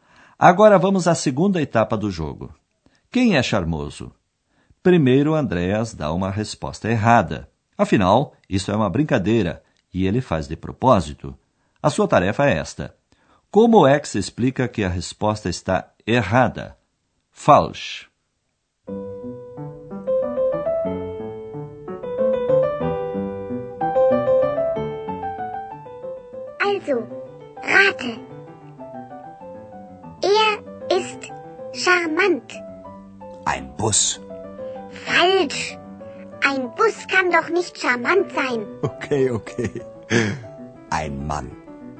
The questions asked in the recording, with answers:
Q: Como é que se explica que a resposta está errada?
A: Ora, um ônibus não pode ser charmoso.